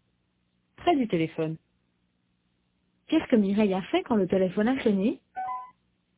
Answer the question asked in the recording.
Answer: Elle a décroché.